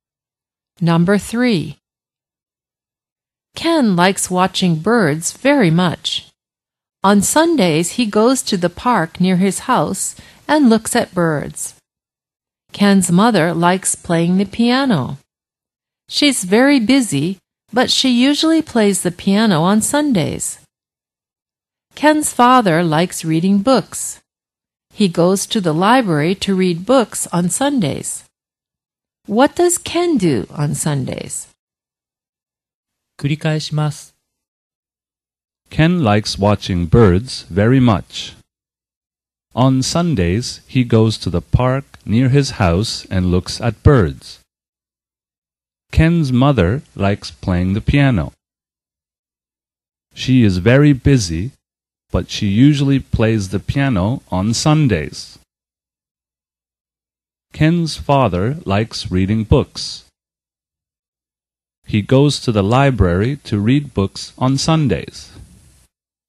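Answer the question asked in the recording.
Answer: He goes to the park near his house and looks at birds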